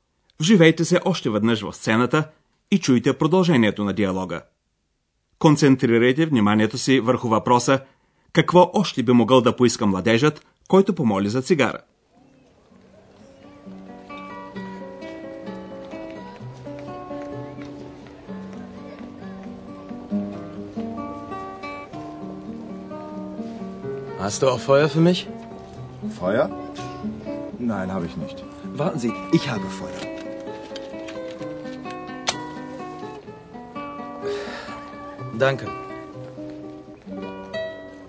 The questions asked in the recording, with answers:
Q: какво още би могъл да поиска младежът, който помоли за цигара?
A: Който иска да пуши, има нужда и от огън.